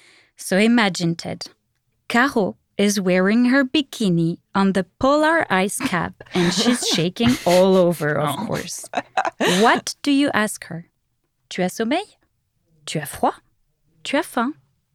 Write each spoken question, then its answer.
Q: What do you ask her? Tu as sommeil?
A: Tu as froid?